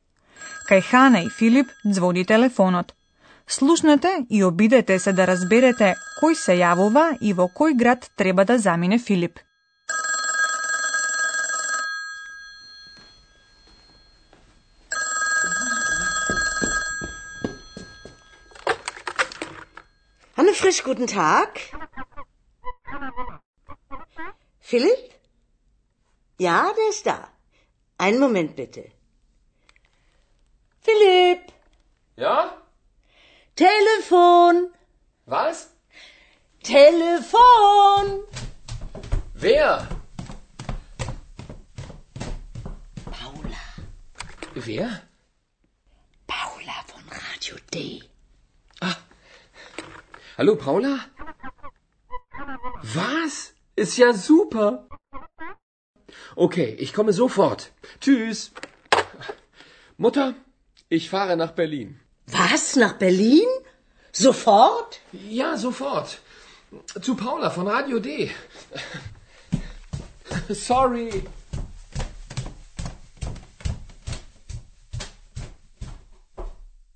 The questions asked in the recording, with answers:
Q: Слушнете и обидете се да разберете кој се јавува и во кој град треба да замине Филип.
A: Се јави една жена што се вика Паула.